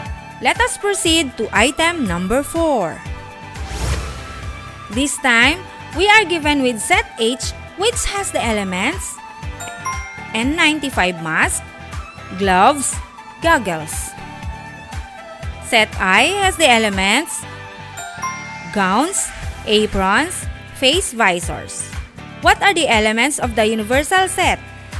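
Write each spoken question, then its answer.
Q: What are the elements of the universal set?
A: N95 mask, gloves, goggles, gowns, aprons, face visors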